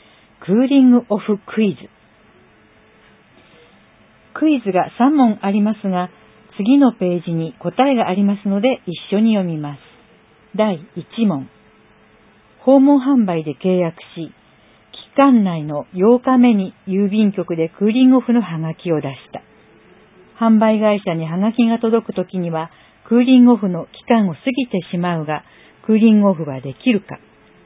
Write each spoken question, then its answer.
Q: 販売会社にハガキが届くときには、クーリングオフの期間を過ぎてしまうが、クーリングオフはできるか。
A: 答え、丸。